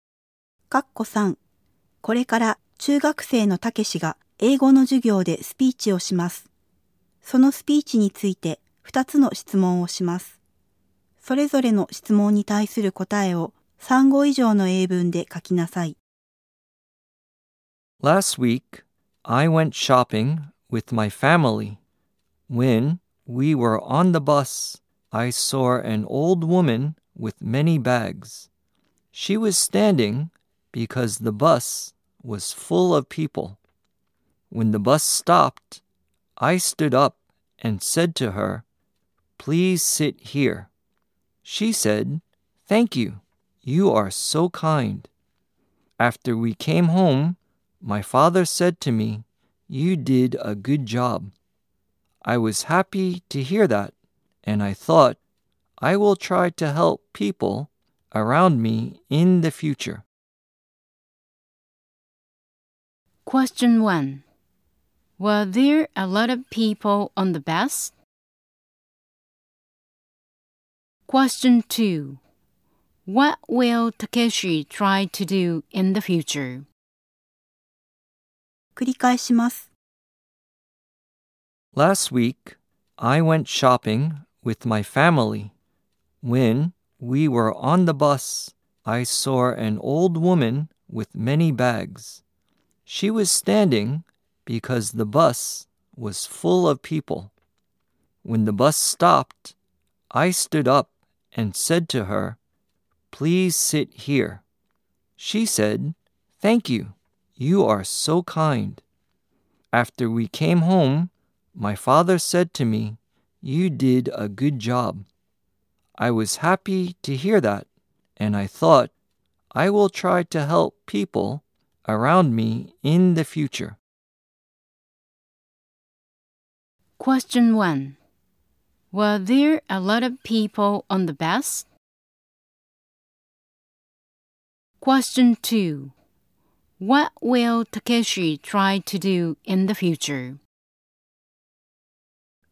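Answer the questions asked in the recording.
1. Yes, there were.
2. He will try to help people around him.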